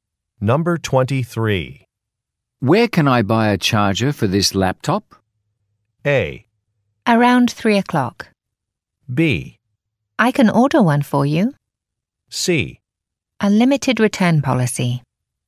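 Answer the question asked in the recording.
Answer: B: I can order one for you.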